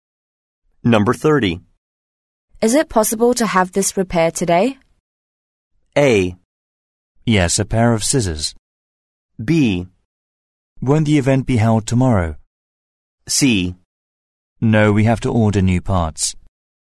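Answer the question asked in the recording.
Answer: C: No, we have to order new parts.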